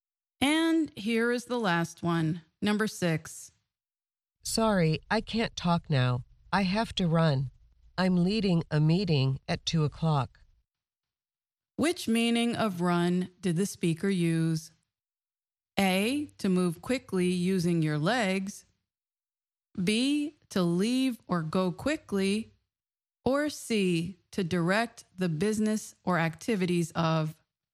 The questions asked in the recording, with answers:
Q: Which meaning of run did the speaker use?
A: The answer is B, to leave or go quickly.